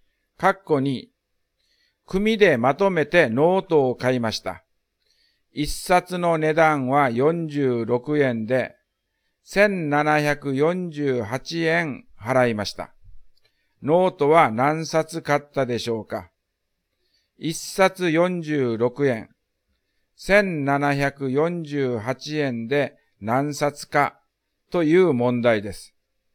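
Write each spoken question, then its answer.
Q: ノートは何冊買ったでしょうか?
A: 38冊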